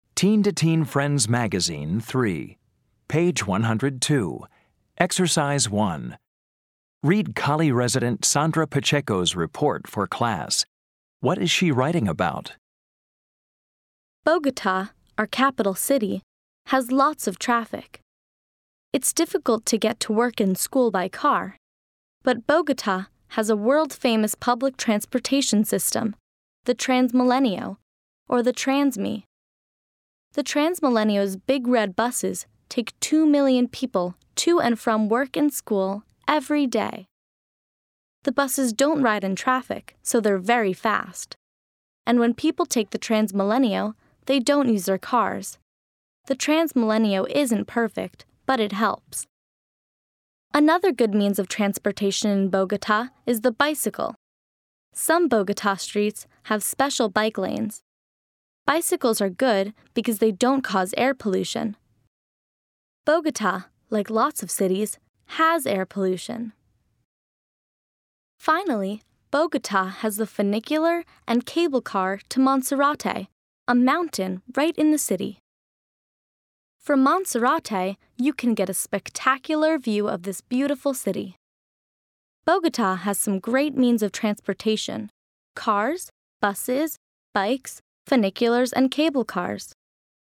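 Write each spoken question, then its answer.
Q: What is she writing about?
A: Means of transportation in Bogota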